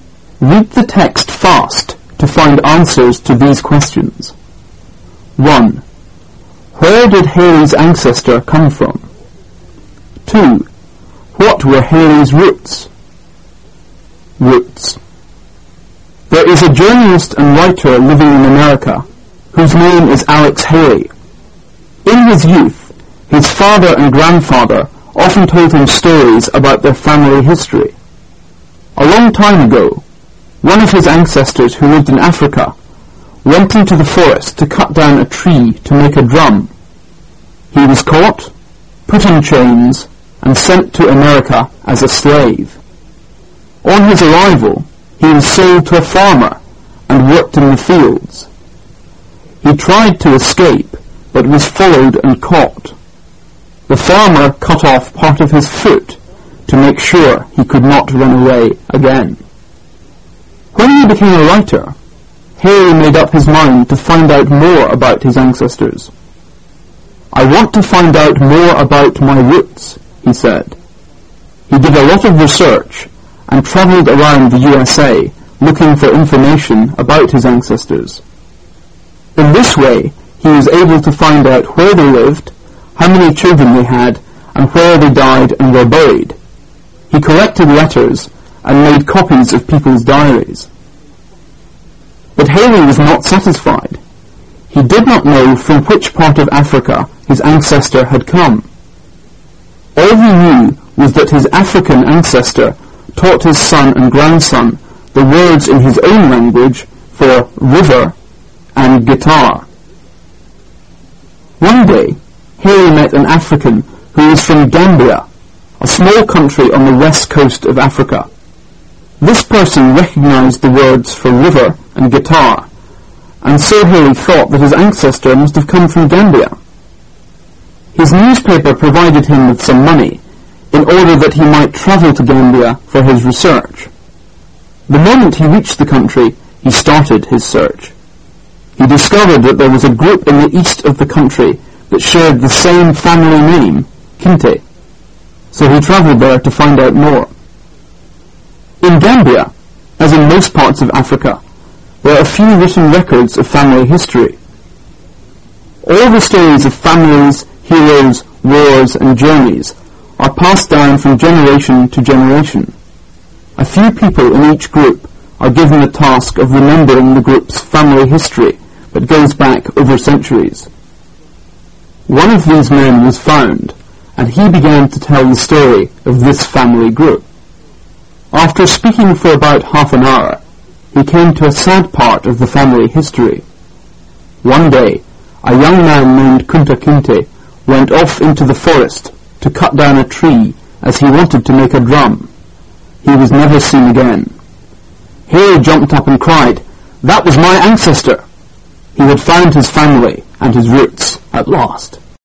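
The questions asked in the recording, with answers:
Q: Where did Haley's ancestor come from?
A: Gambia, on the west coast of Africa

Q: What were Haley's roots?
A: The Kinte family of Gambia; his ancestor was Kunta Kinte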